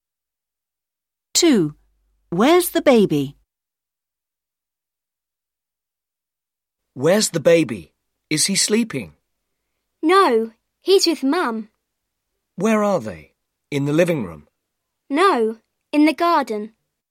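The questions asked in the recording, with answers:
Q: Where's the baby?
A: In the garden with Mum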